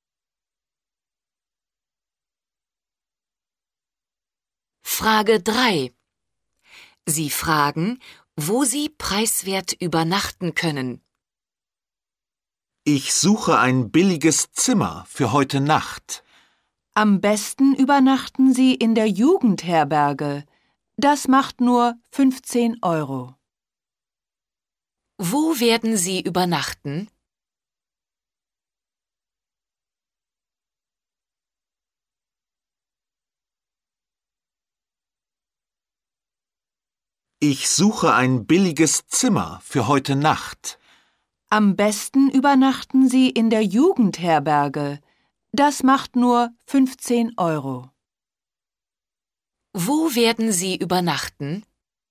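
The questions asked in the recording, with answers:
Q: Wo werden Sie übernachten?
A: in der Jugendherberge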